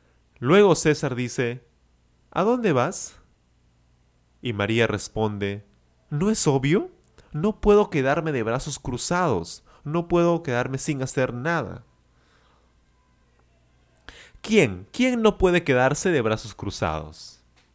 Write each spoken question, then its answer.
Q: ¿Quién? ¿Quién no puede quedarse de brazos cruzados?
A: María, por supuesto, María.